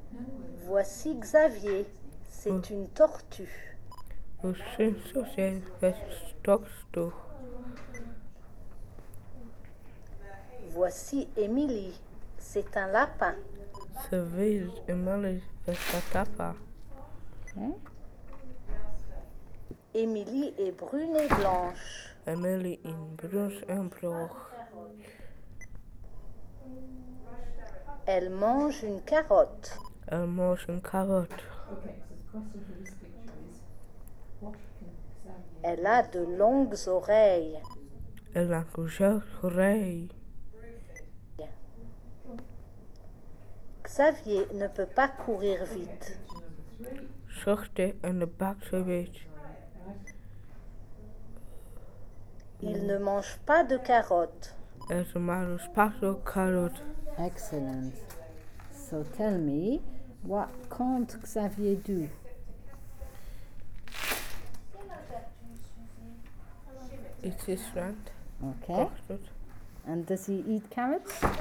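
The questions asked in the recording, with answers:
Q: So tell me, what can't Xavier do?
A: Run fast

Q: And does he eat carrots?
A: No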